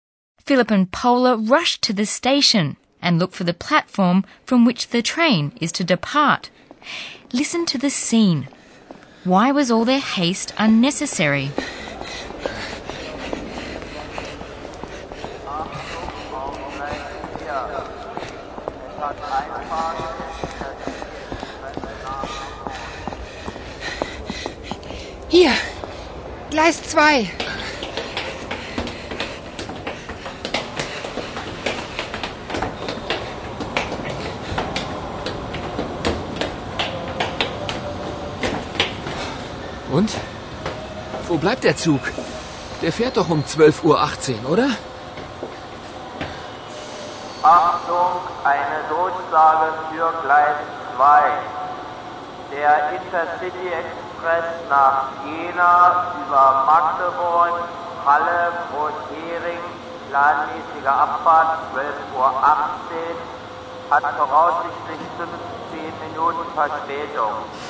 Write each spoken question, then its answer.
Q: Why was all their haste unnecessary?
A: The train that Paula and Philip want to take to Jena is estimated to be 15 minutes late.